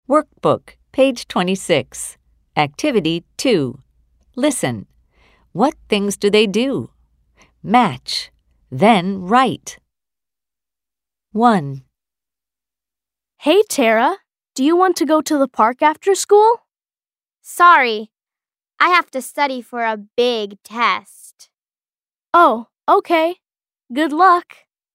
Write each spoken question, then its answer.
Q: What things do they do?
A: Tara studies for a test.